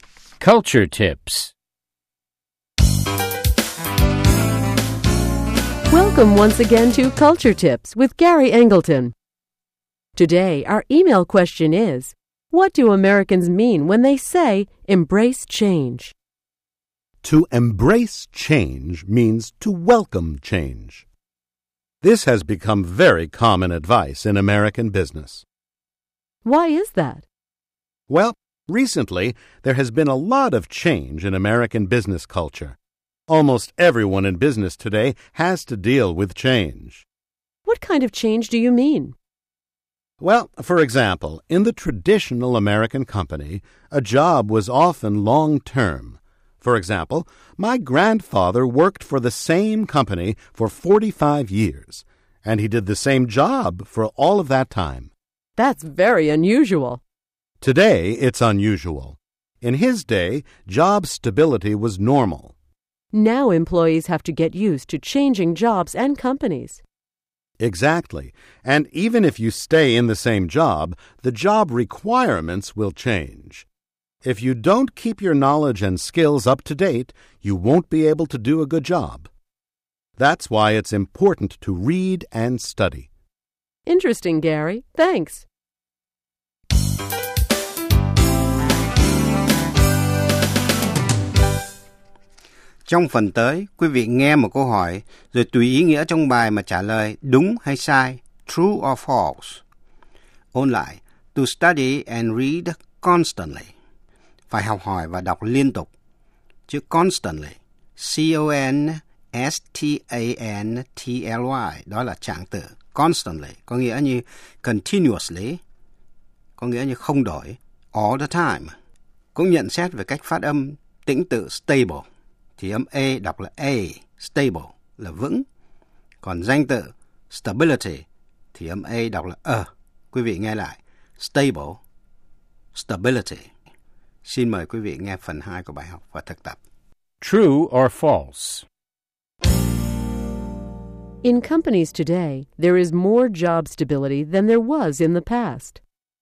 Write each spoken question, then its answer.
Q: In companies today, there is more job stability than there was in the past.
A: False. Now employees have to be prepared for changing jobs and companies.